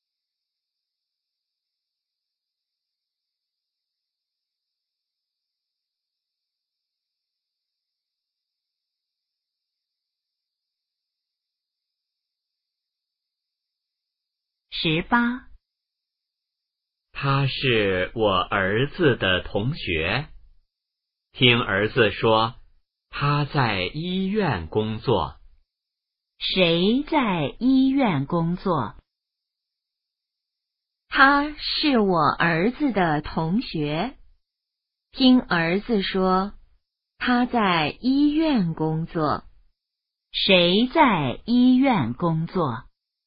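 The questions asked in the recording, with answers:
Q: 谁在医院工作?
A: 儿子的同学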